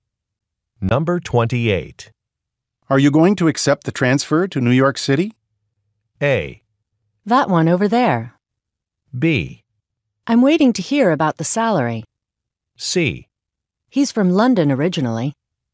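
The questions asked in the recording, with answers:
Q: Are you going to accept the transfer to New York City?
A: B: I'm waiting to hear about the salary.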